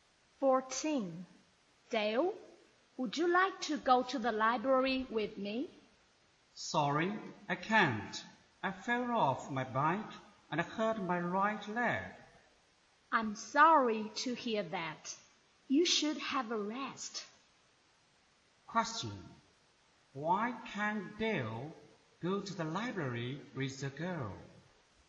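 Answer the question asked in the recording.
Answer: He hurt his right leg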